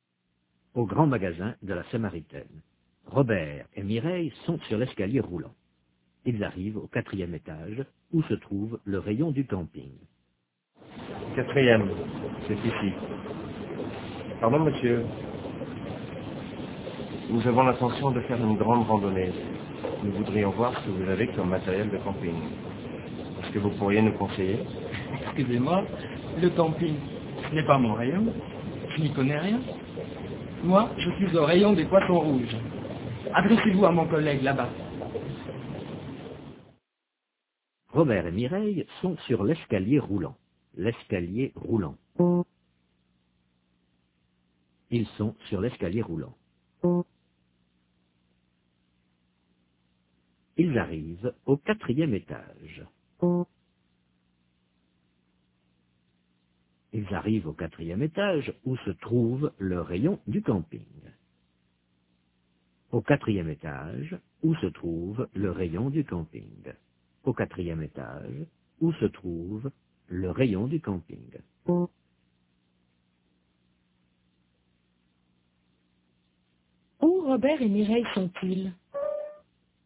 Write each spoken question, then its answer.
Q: Où Robert et Mireille sont-ils?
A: Au grand magasin de la Samaritaine, sur l'escalier roulant.